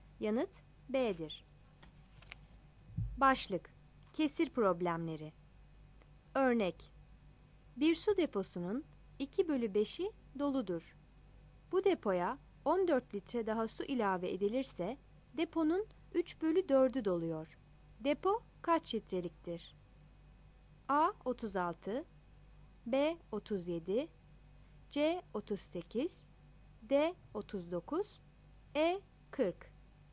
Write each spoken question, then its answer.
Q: Depo kaç litreliktir?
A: Yanıt E'dir.